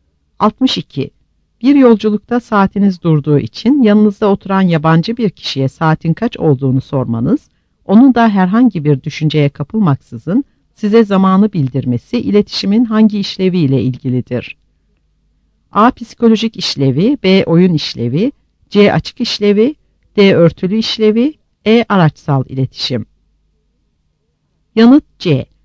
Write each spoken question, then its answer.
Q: Bir yolculukta saatiniz durduğu için yanınızda oturan yabancı bir kişiye saatin kaç olduğunu sormanız, onun da herhangi bir düşünceye kapılmaksızın size zamanı bildirmesi iletişimin hangi işlevi ile ilgilidir?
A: Yanıt C.